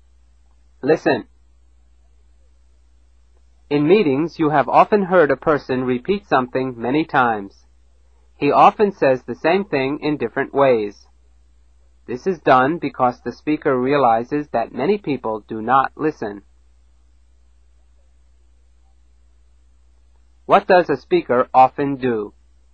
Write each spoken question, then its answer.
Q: What does a speaker often do?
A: He repeats something.